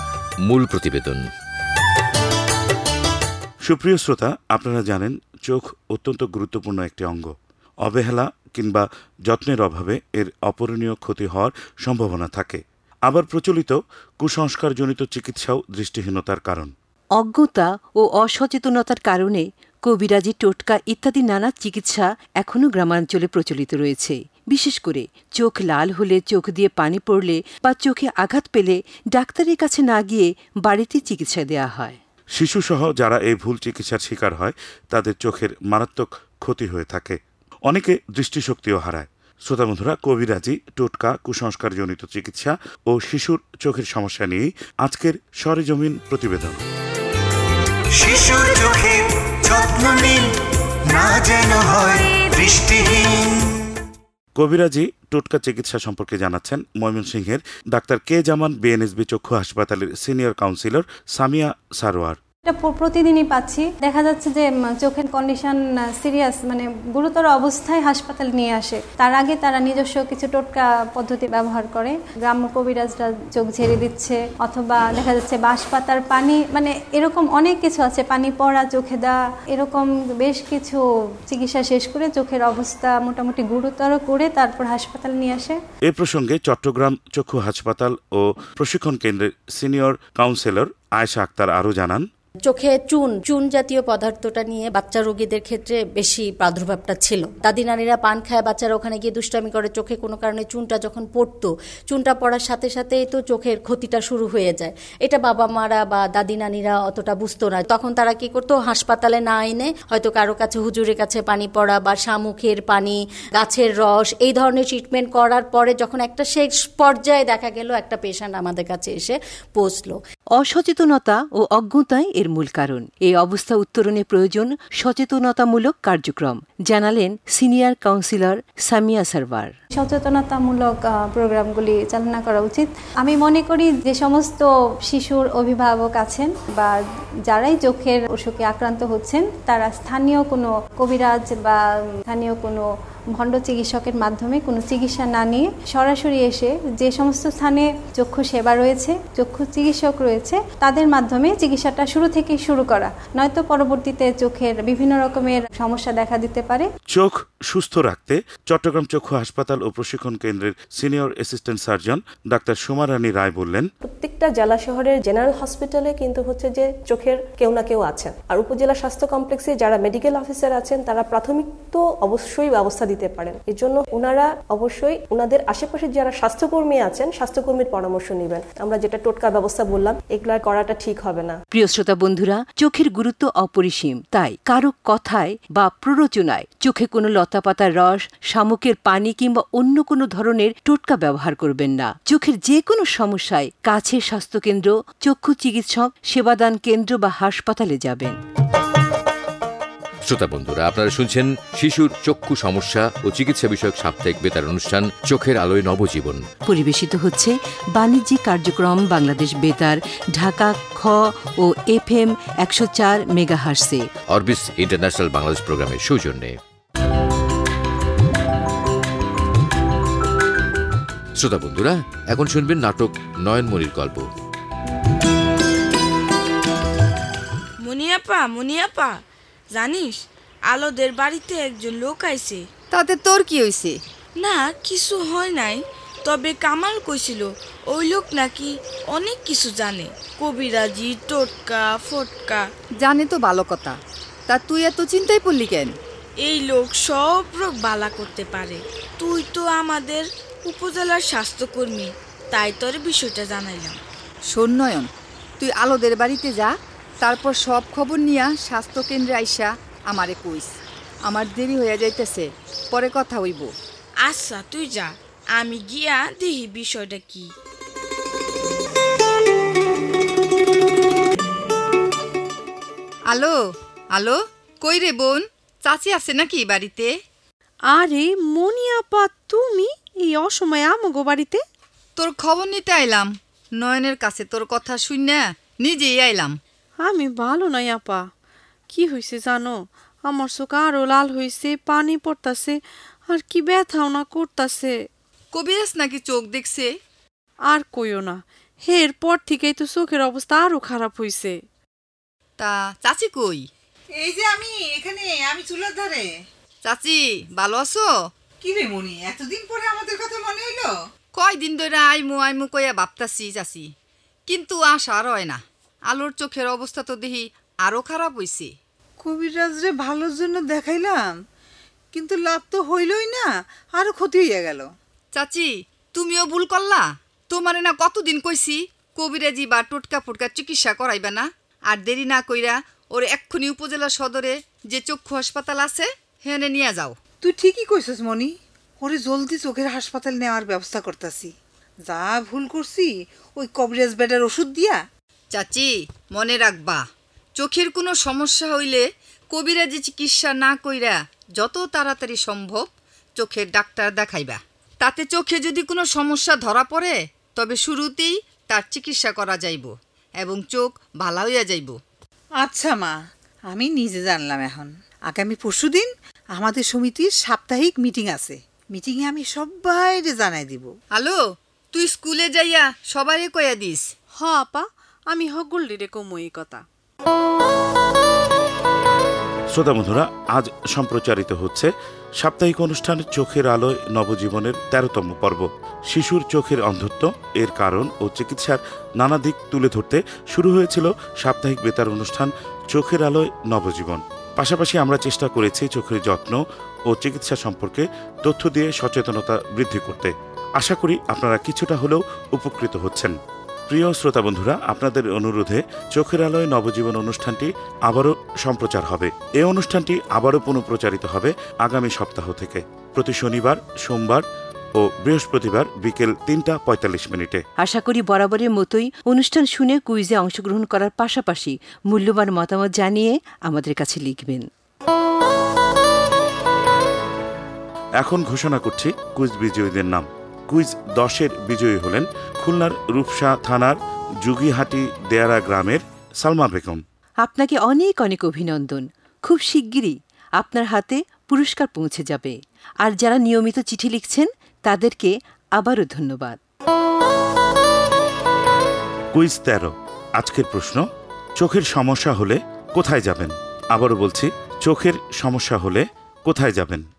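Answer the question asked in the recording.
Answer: কাছের স্বাস্থ্যকেন্দ্র, চক্ষু চিকিৎসক, সেবাদান কেন্দ্র বা চক্ষু হাসপাতালে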